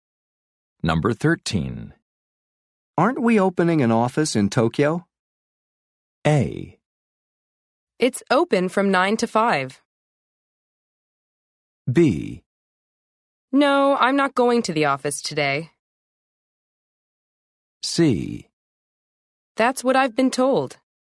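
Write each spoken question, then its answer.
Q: Aren't we opening an office in Tokyo?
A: C: That's what I've been told.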